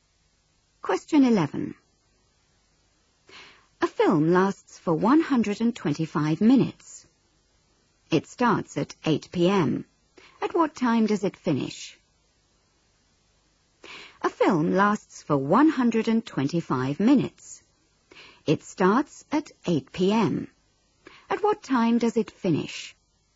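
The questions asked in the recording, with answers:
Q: At what time does it finish?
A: 10:05 p.m.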